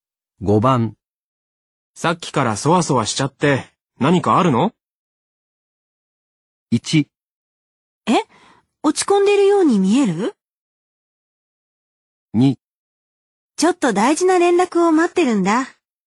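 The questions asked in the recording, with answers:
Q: さっきからそわそわしちゃって、何かあるの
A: 2: ちょっと大事な連絡を待ってるんだ。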